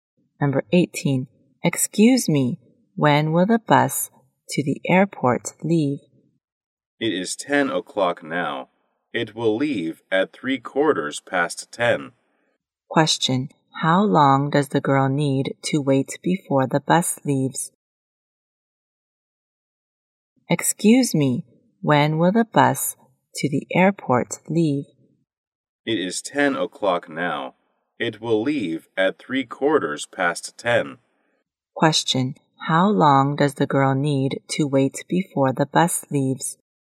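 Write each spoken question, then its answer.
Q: How long does the girl need to wait before the bus leaves?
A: 15 minutes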